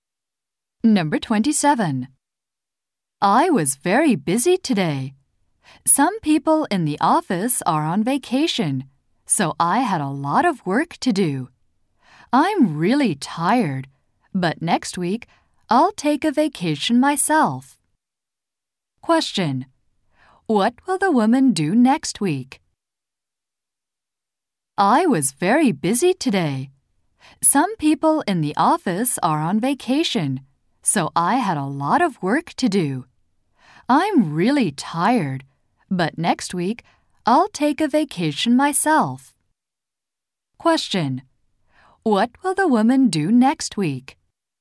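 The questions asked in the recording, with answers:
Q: What will the woman do next week?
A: Take a vacation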